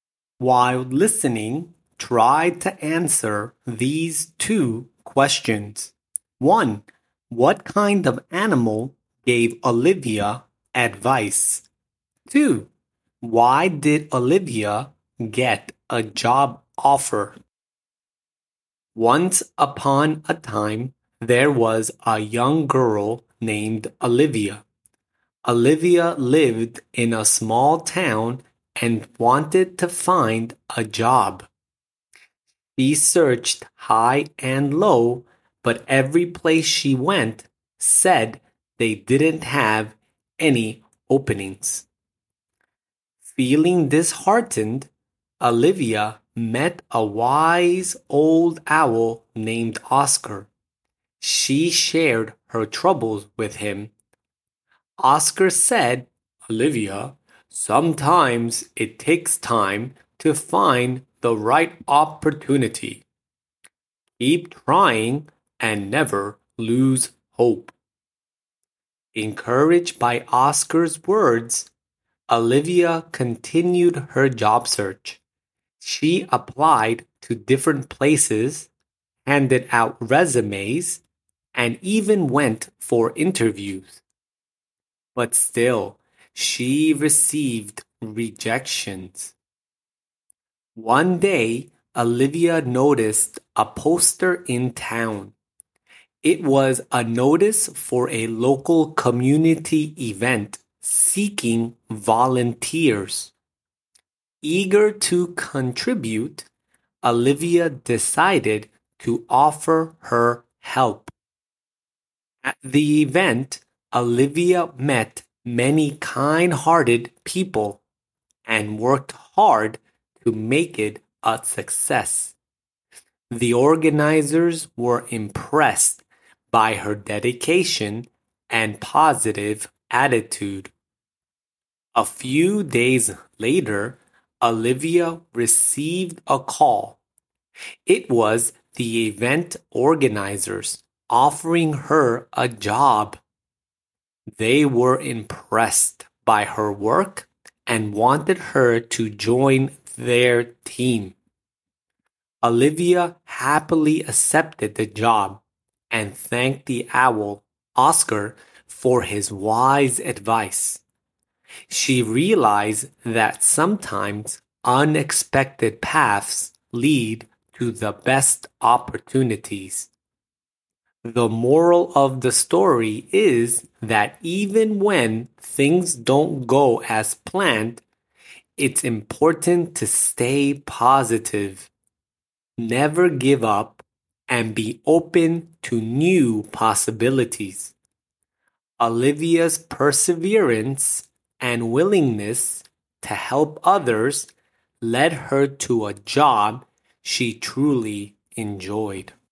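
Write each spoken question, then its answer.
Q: What kind of animal gave Olivia advice?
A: An owl

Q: Why did Olivia get a job offer?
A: The event organizers were impressed by her volunteer work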